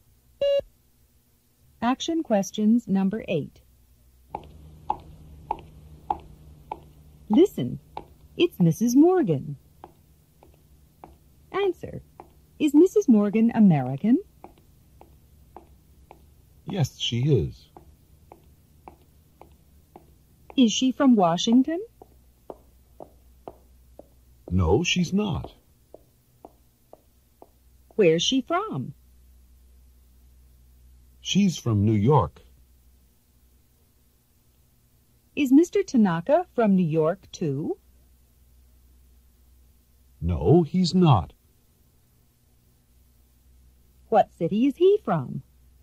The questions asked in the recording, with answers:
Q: Answer, is Mrs. Morgan American?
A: Yes, she is.

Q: Is she from Washington?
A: No, she's not.

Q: Where's she from?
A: She's from New York.

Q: Is Mr. Tanaka from New York, too?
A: No, he's not.